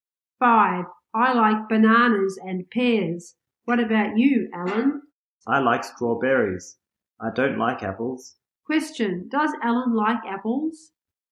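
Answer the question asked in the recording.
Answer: No, he doesn't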